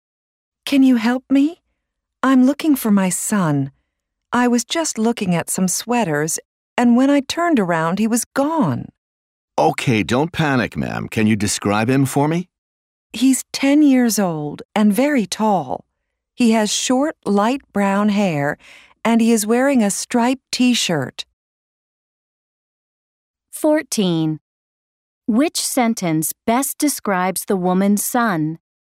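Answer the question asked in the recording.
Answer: He is 10, very tall, with short light brown hair and a striped T-shirt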